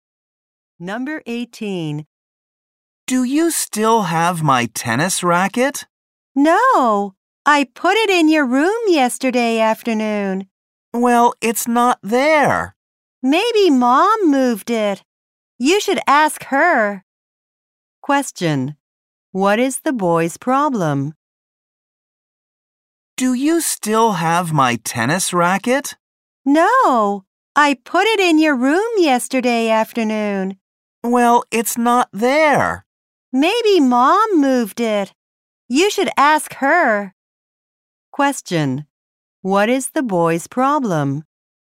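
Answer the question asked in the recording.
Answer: He can't find his tennis racket.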